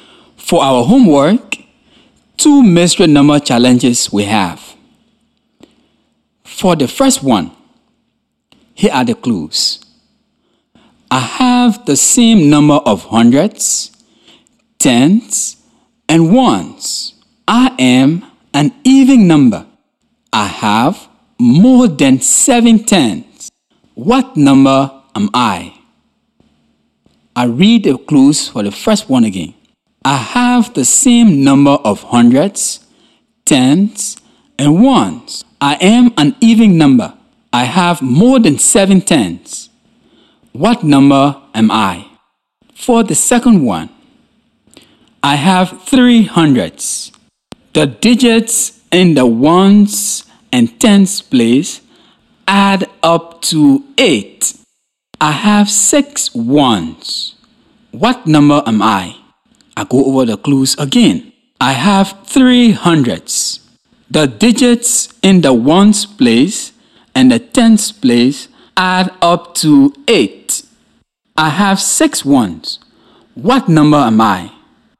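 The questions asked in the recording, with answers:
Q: What number am I?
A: 888

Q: I have six ones. What number am I?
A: 326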